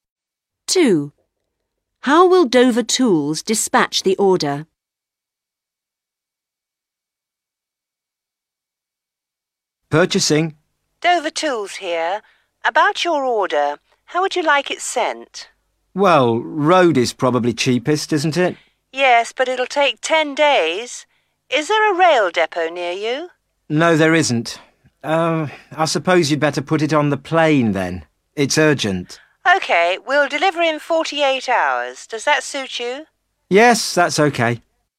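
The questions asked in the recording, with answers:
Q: How will Dover Tools dispatch the order?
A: By plane (air)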